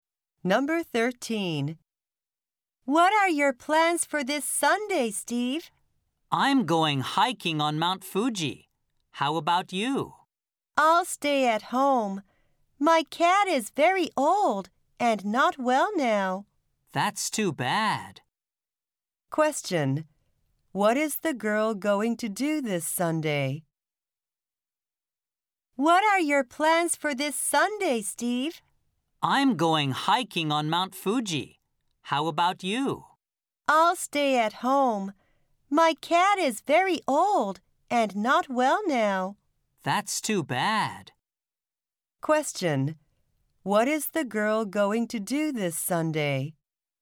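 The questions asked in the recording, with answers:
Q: What is the girl going to do this Sunday?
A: Stay at home (her cat is old and sick)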